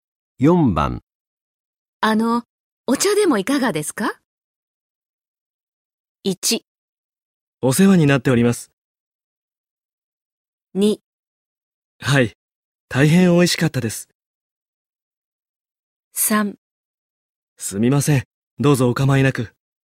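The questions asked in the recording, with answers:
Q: あの、お茶でもいかがですか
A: 3: すみません。どうぞお構いなく。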